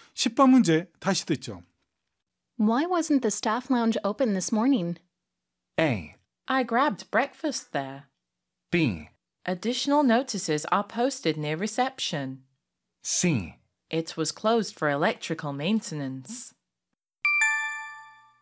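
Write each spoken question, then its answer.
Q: Why wasn't the staff lounge open this morning?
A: C: It was closed for electrical maintenance.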